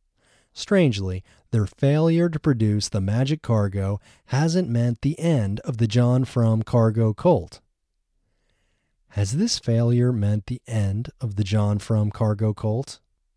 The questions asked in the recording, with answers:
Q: Has this failure meant the end of the John Frum cargo cult?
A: No, this failure hasn't meant the end of the John Frum cargo cult.